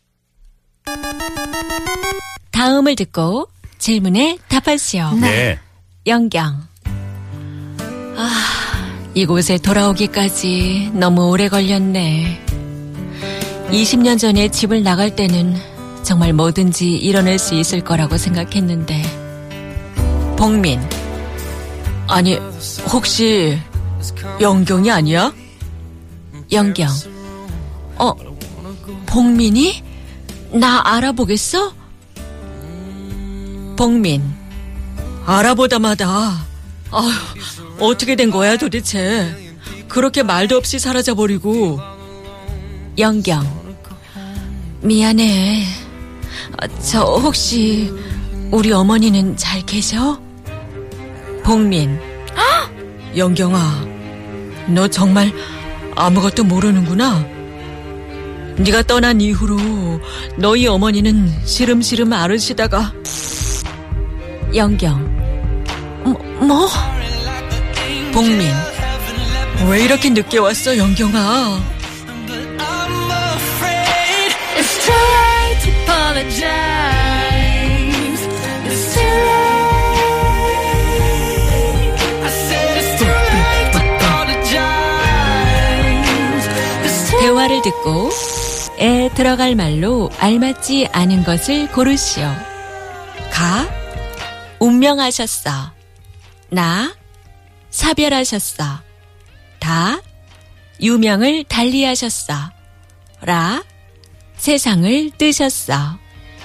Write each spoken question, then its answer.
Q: ...를 듣고 에 들어갈 말로 알맞지 않은 것을 고르시오.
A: 나 사별하셨어. To bereave.